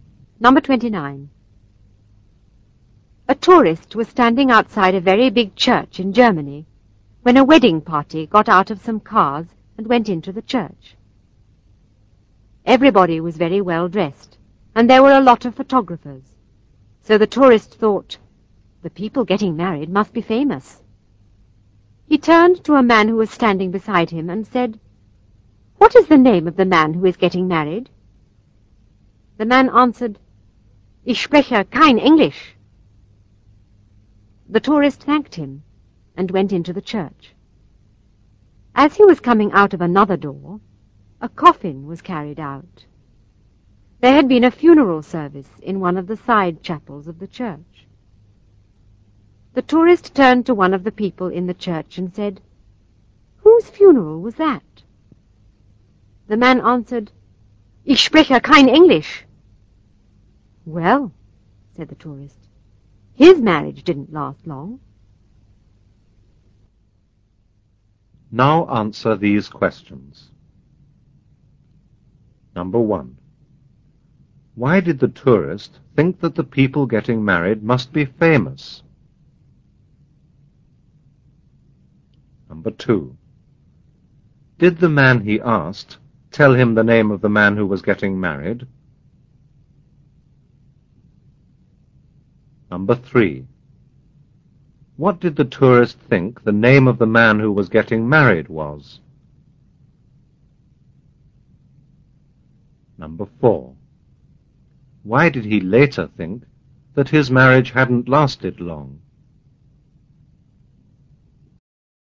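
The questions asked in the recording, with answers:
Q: Why did the tourist think that the people getting married must be famous?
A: Because everybody was very well dressed and there were a lot of photographers.

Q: Did the man he asked tell him the name of the man who was getting married?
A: No, he said he didn't speak English.

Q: What did the tourist think the name of the man who was getting married was?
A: Ich spreche kein Englisch.

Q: Why did he later think that his marriage hadn't lasted long?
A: Because he was told the dead man's name was also "Ich spreche kein Englisch", so he thought the groom had died.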